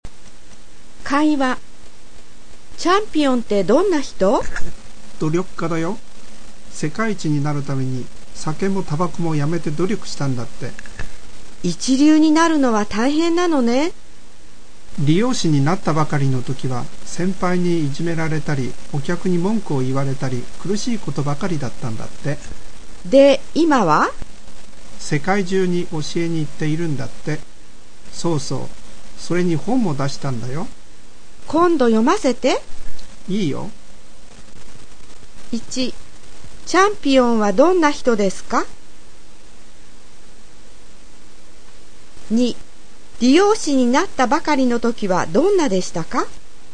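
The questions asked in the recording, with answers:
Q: チャンピオンはどんな人ですか?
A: 努力家

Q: 理容師になったばかりの時はどんなでしたか?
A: 先輩にいじめられたり、お客に文句を言われたりして、苦しいことばかりだった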